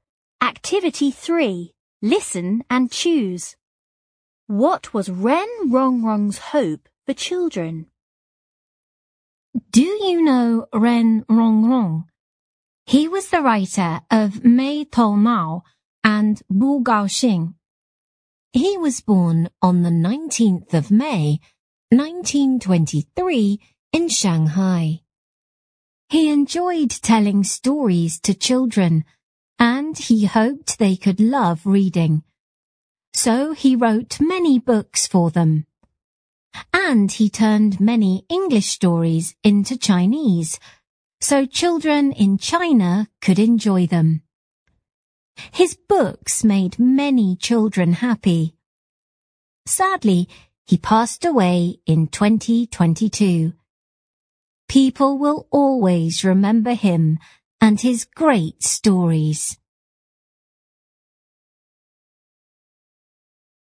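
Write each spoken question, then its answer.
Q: What was Ren Rong Rong's hope for children?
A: He hoped they could love reading.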